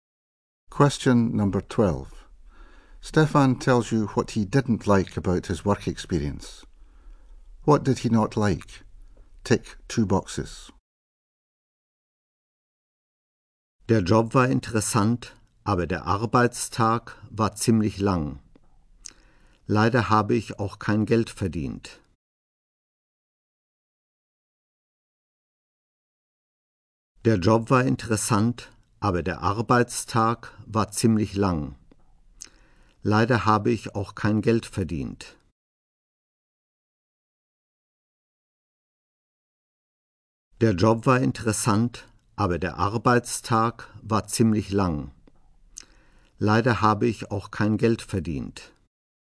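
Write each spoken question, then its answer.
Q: What did he not like?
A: The long working day and earning no money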